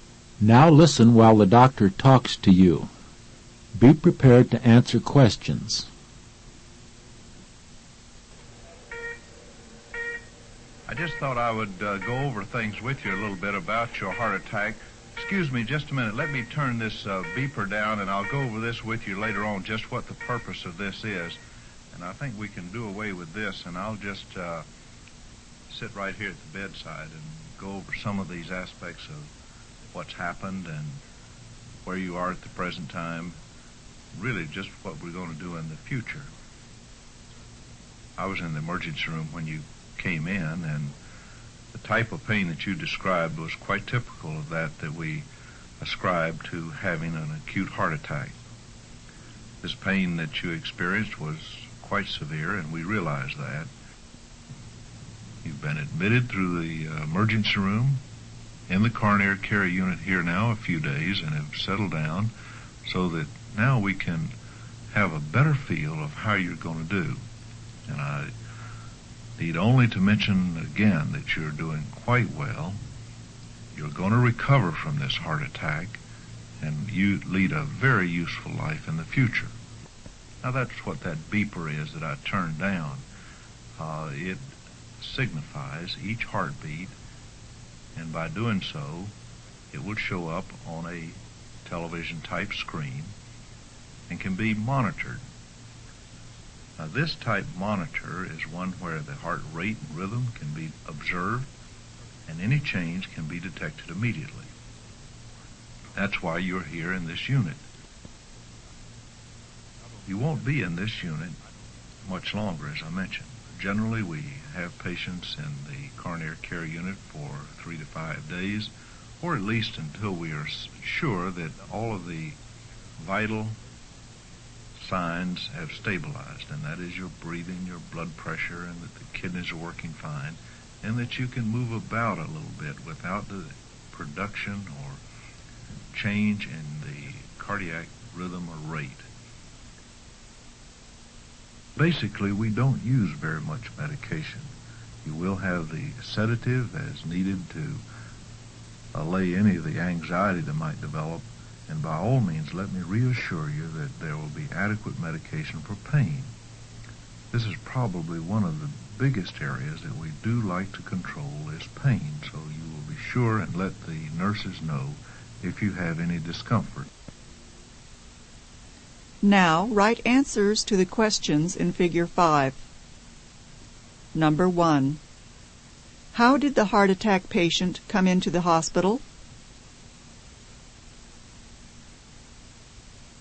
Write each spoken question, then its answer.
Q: How did the heart attack patient come into the hospital?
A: The answer is admitted. He was admitted through the emergency room.